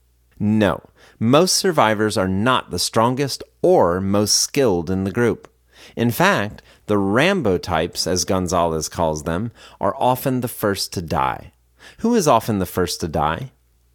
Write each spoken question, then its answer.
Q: Who is often the first to die?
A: The Rambo types are often the first to die.